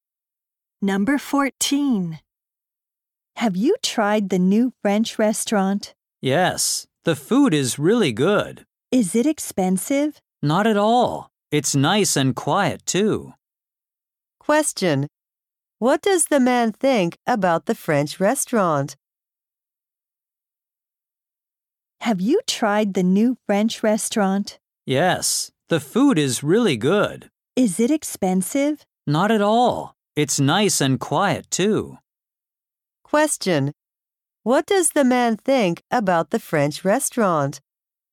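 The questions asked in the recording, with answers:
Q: What does the man think about the French restaurant?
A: The food is good, it's not expensive, and it's quiet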